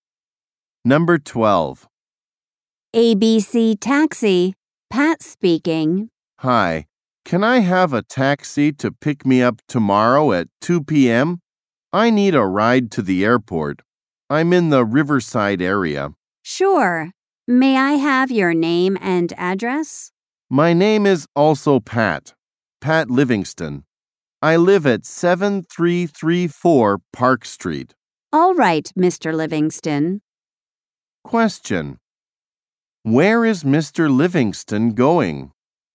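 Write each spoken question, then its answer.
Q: Where is Mr. Livingston going?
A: To the airport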